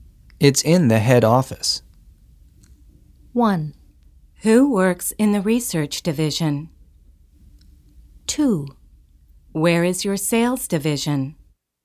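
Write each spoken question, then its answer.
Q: It's in the head office.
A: 2: Where is your sales division?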